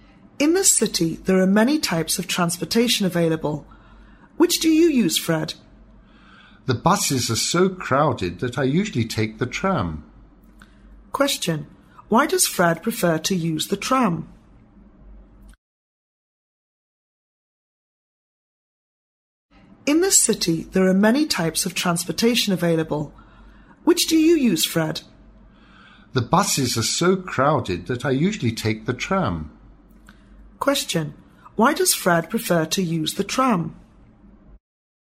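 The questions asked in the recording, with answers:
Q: Why does Fred prefer to use the tram?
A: Because the buses are so crowded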